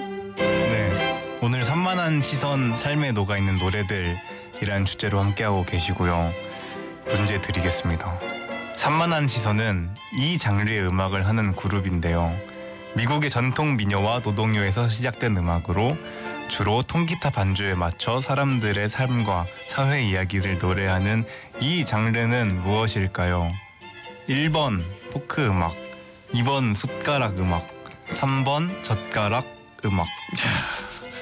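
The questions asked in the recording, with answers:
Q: 미국의 전통 민요와 노동요에서 시작된 음악으로 주로 통기타 반주에 맞춰 사람들의 삶과 사회 이야기를 노래하는 이 장르는 무엇일까요?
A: 1번: 포크 음악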